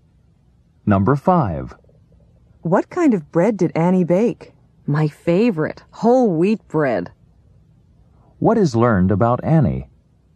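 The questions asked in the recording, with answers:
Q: What is learned about Annie?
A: She baked whole wheat bread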